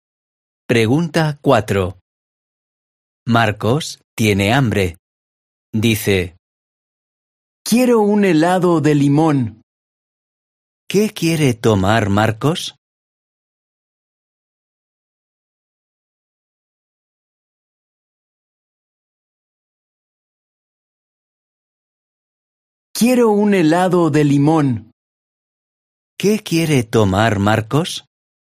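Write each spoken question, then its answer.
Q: ¿Qué quiere tomar Marcos?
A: un helado de limón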